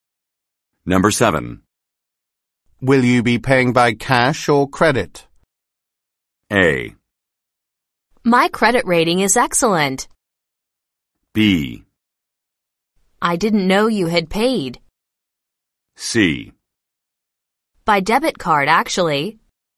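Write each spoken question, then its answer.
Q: Will you be paying by cash or credit?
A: C: By debit card, actually.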